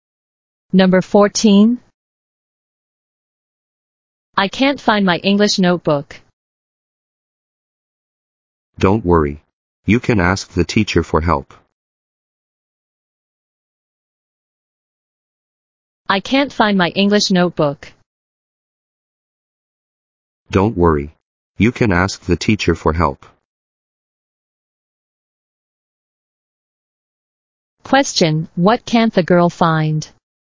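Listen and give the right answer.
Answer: Her English notebook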